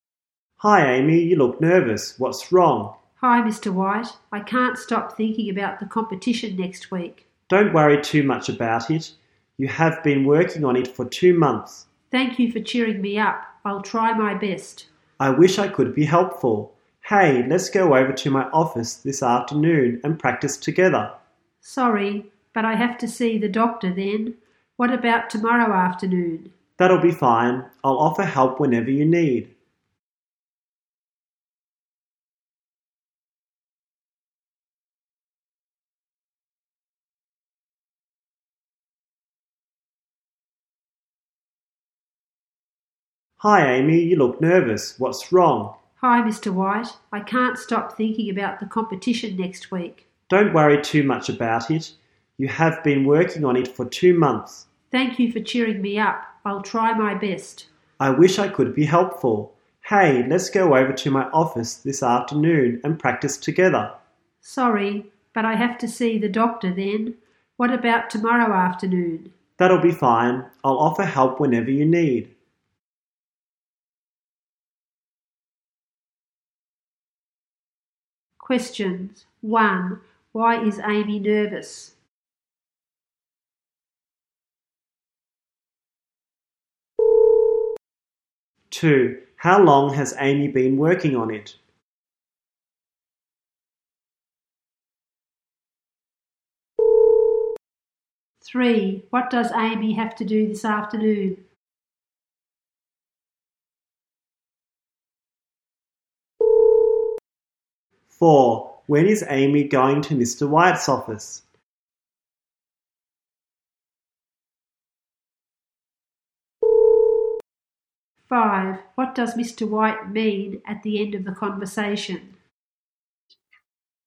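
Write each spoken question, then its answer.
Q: Why is Amy nervous?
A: Because of the competition next week

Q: How long has Amy been working on it?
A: For 2 months

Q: What does Amy have to do this afternoon?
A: See the doctor

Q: When is Amy going to Mr.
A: Tomorrow afternoon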